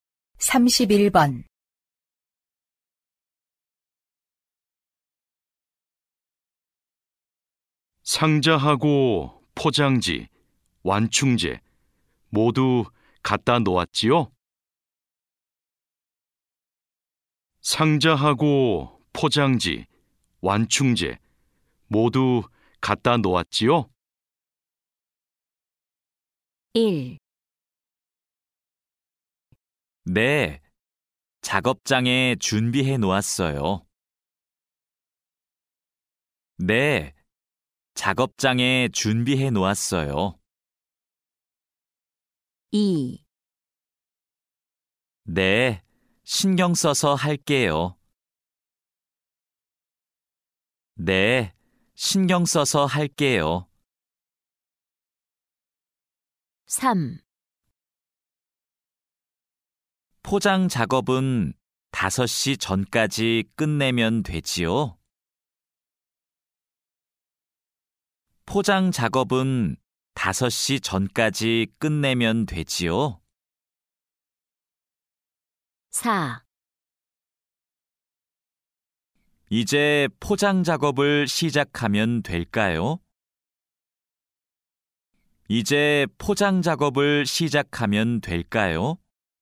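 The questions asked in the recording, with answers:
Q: 상자하고 포장지, 완충재 모두 갖다 놓았지요?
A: 1: 네, 작업장에 준비해 놓았어요.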